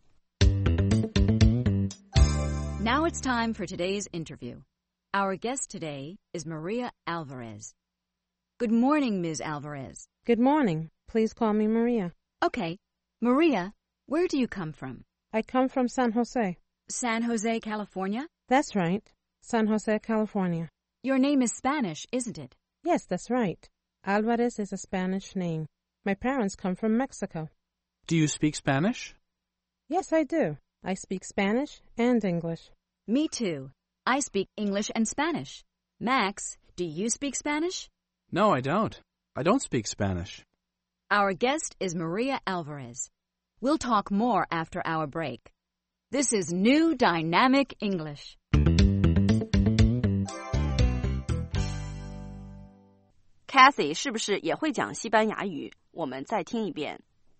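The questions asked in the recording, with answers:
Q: Kathy 是不是也会讲西班牙语?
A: 会,她会说英语和西班牙语。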